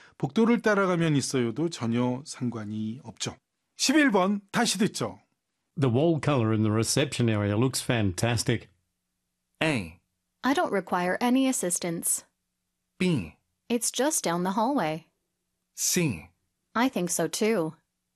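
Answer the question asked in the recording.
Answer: C: I think so too.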